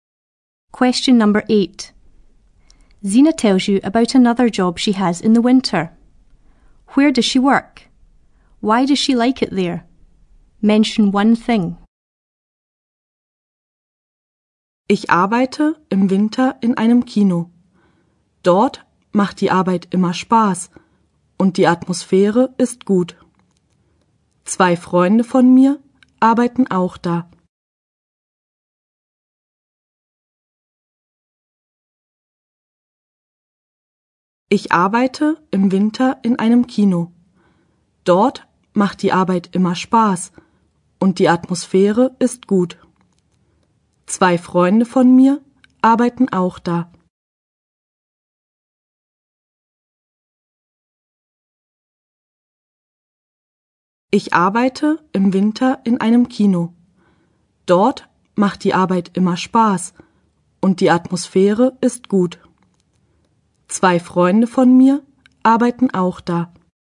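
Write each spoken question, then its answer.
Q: Where does she work?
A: In a cinema

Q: Why does she like it there?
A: The work is always fun, the atmosphere is good, or two friends work there too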